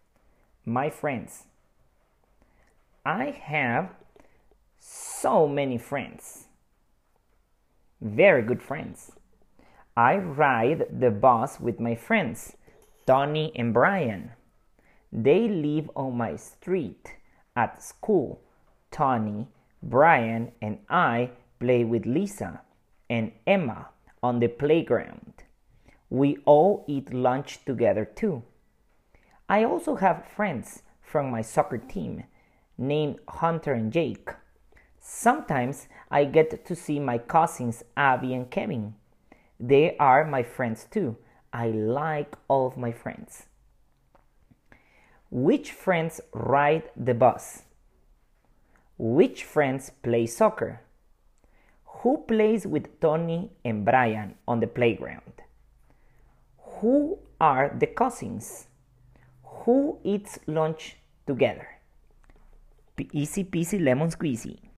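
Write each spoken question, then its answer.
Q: Which friends ride the bus?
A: Tony and Brian

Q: Which friends play soccer?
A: Hunter and Jake

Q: Who plays with Tony and Brian on the playground?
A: Lisa and Emma (and the narrator)

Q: Who are the cousins?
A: Abby and Kevin

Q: Who eats lunch together?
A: the narrator, Tony, Brian, Lisa and Emma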